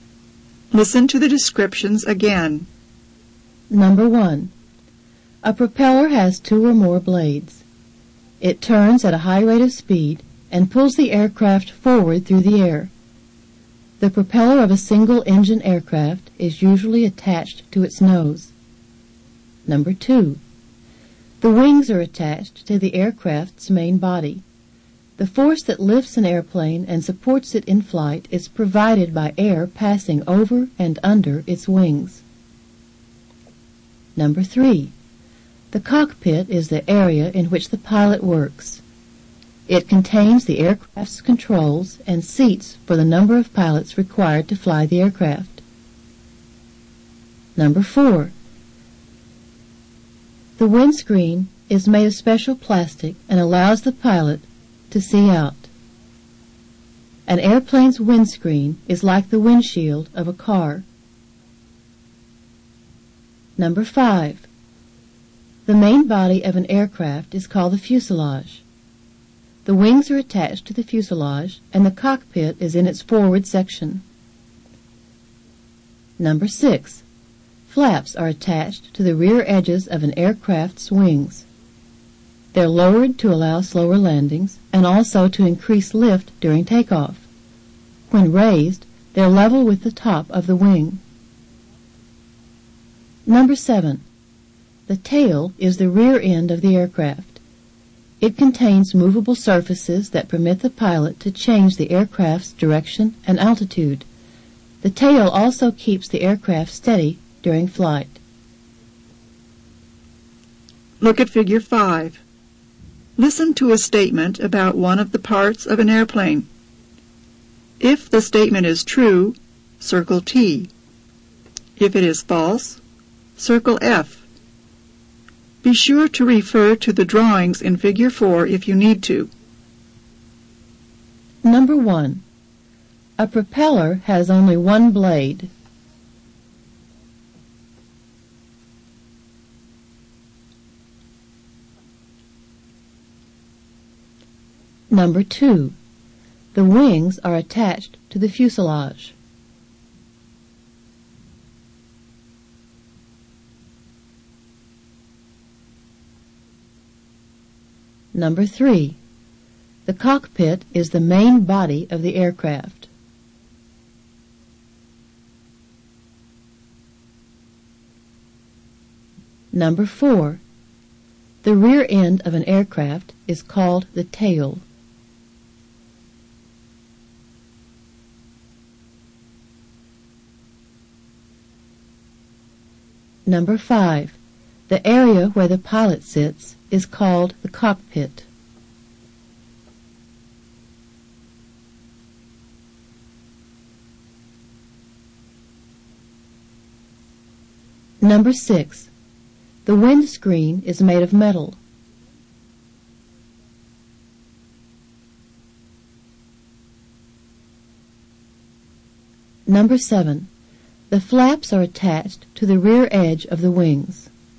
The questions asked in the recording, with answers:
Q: A propeller has only one blade.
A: Number 1 is false.

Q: The wings are attached to the fuselage.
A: Number 2 is true.

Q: The cockpit is the main body of the aircraft.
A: Number 3 is false.

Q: The rear end of an aircraft is called the tail.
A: Number 4 is true.

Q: The area where the pilot sits is called the cockpit.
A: Number 5 is true.

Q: The windscreen is made of metal.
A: Number 6 is false.

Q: The flaps are attached to the rear edge of the wings.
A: Number 7 is true.